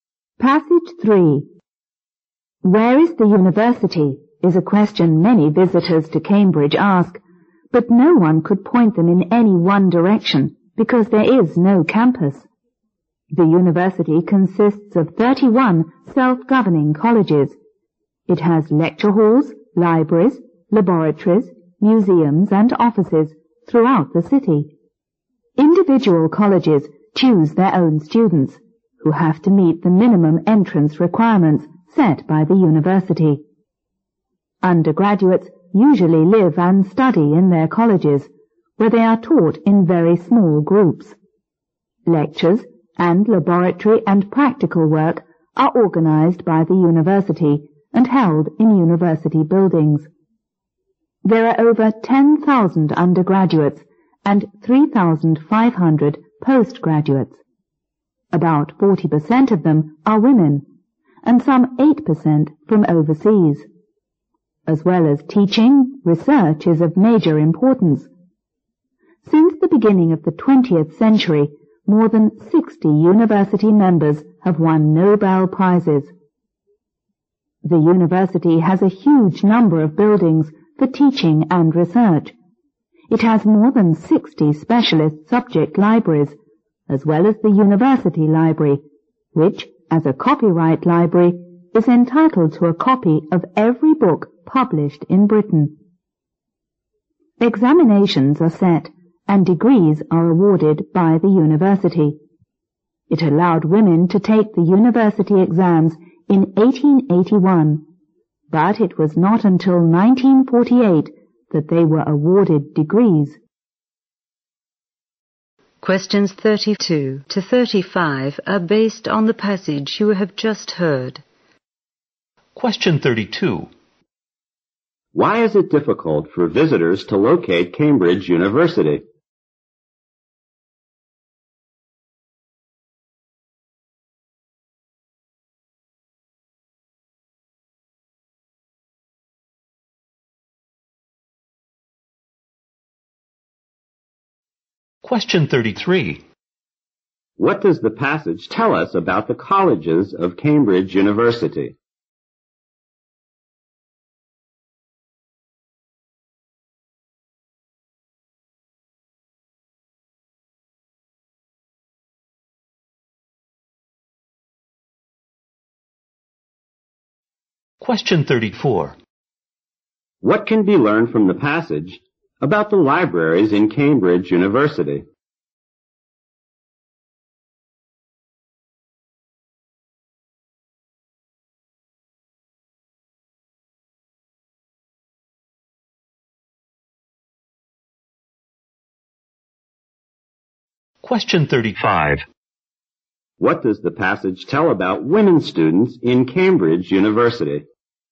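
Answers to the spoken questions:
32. It has no campus
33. They are self-governing and choose their own students
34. The university library is entitled to a copy of every book published in Britain
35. They could take exams from 1881 but got degrees only from 1948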